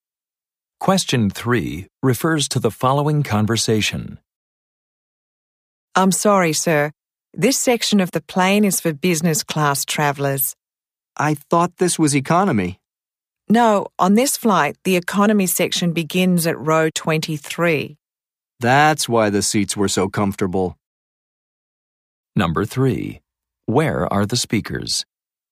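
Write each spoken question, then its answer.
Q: Where are the speakers?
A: On a plane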